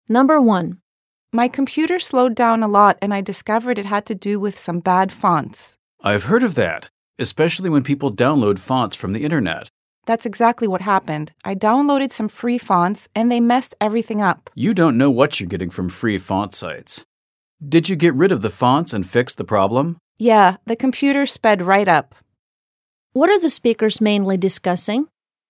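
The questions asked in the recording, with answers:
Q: What are the speakers mainly discussing?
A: Free fonts downloaded from the internet that slowed down a computer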